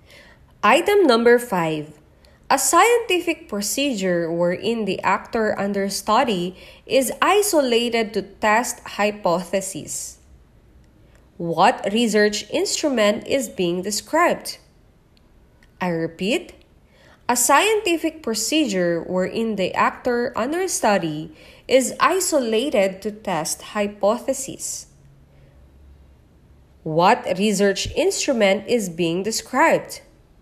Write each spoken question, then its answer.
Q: What research instrument is being described?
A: It's letter C, experiment.